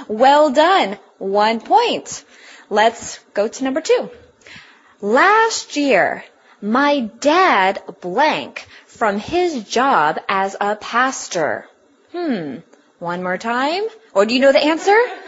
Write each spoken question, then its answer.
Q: Last year, my dad blank from his job as a pastor.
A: Retired.